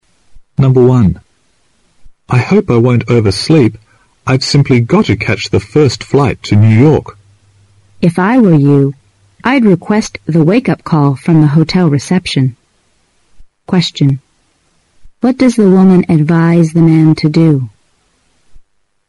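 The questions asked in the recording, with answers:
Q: What does the woman advise the man to do?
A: Ask the hotel reception for a wake-up call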